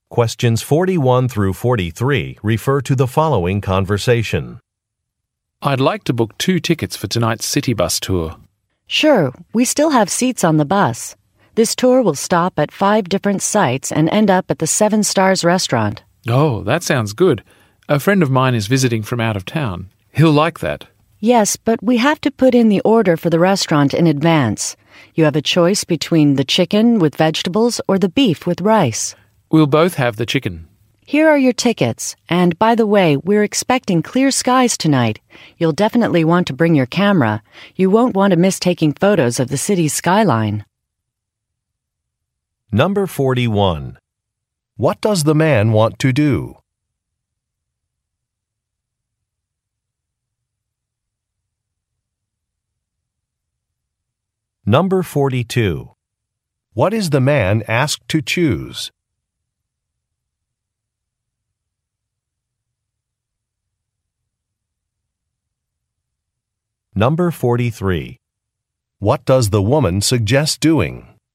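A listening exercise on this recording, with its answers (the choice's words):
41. What does the man want to do?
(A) Purchase an area map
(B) See an event schedule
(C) Cancel a hotel reservation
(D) Book a bus tour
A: Book a bus tour

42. What is the man asked to choose?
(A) When to arrive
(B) What to visit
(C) How to pay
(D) What to eat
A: What to eat

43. What does the woman suggest doing?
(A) Wearing a jacket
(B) Using a credit card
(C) Bringing a camera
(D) Looking for a coupon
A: Bringing a camera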